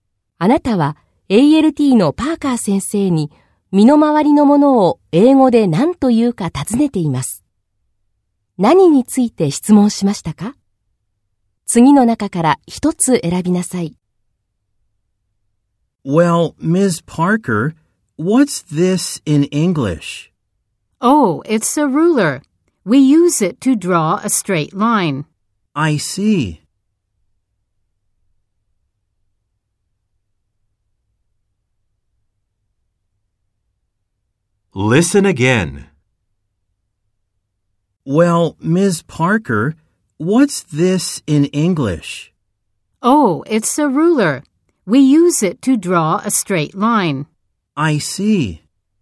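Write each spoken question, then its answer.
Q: 何について質問しましたか?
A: 定規(ruler)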